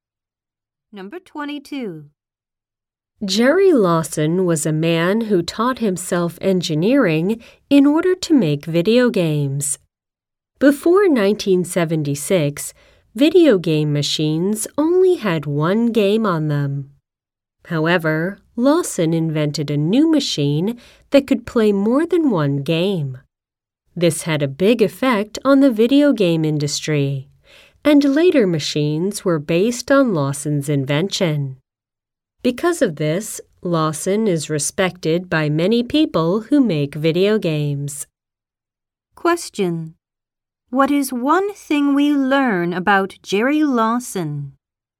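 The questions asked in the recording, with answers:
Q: What is one thing we learn about Jerry Lawson?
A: He invented a machine that could play more than one game.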